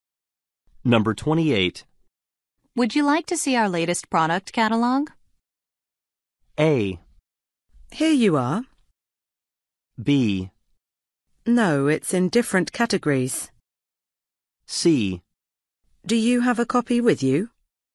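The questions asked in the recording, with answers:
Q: Would you like to see our latest product catalog?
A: C: Do you have a copy with you?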